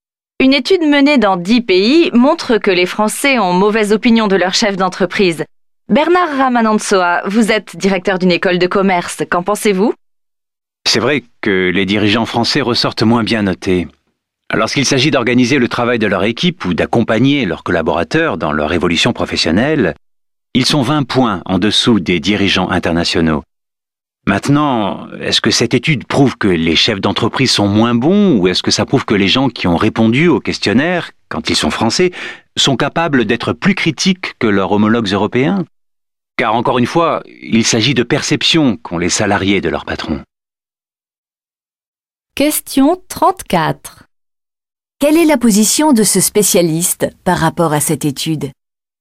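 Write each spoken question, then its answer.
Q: Quelle est la position de ce spécialiste par rapport à cette étude ?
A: Il la relativise : elle montre peut-être surtout que les salariés français sont plus critiques envers leur patron, car il s'agit de perceptions.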